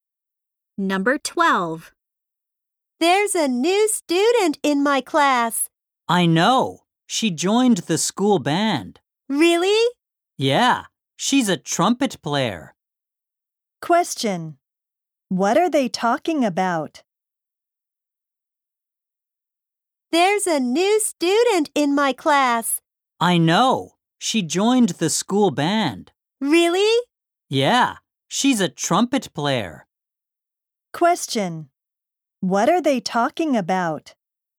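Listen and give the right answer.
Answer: A new student.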